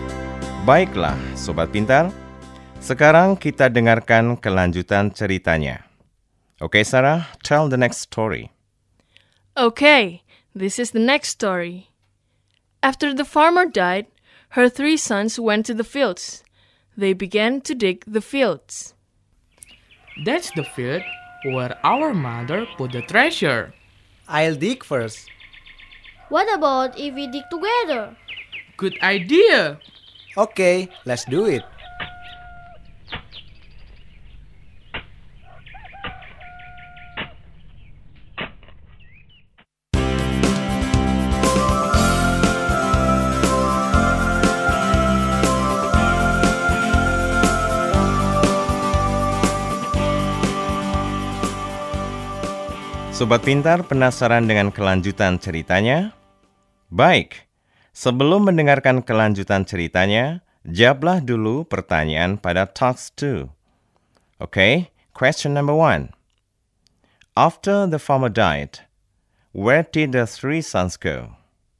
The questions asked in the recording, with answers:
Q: After the farmer died, where did the three sons go?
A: To the fields. Yes, right.